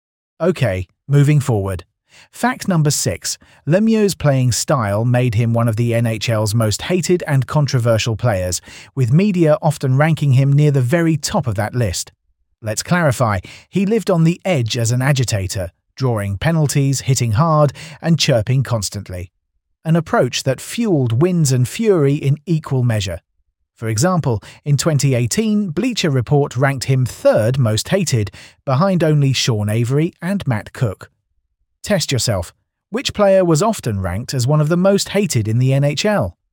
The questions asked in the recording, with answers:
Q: Which player was often ranked as one of the most hated in the NHL?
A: Correct answer. Claude Lemieux.